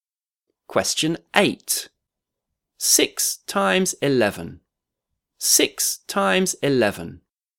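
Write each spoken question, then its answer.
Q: 6 times 11. 6 times 11.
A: 66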